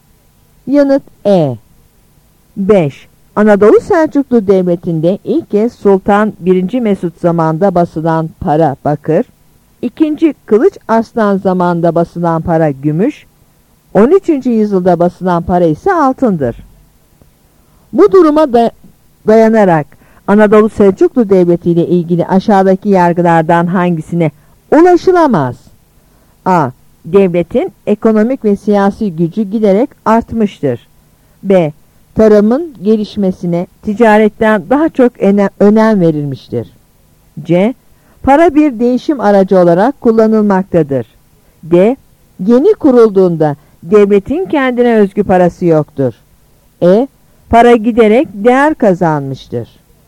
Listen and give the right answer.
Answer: Yanıt B.